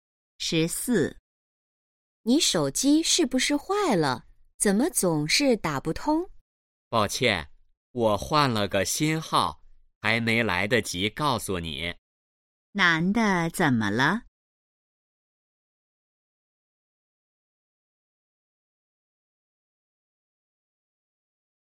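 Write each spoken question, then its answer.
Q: 男的怎么了?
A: 换了新手机号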